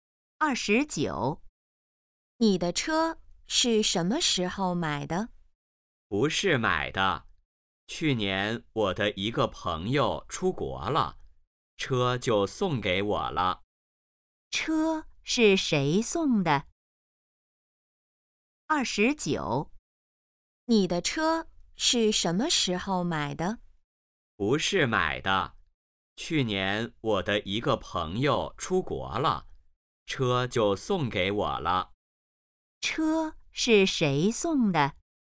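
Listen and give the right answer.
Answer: 朋友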